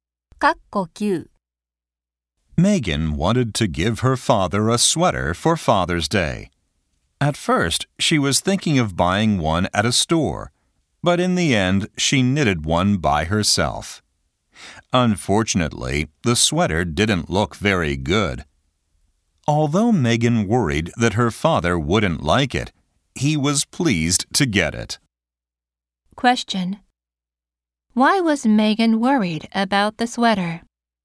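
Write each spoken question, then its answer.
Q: Why was Megan worried about the sweater?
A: It didn't look very good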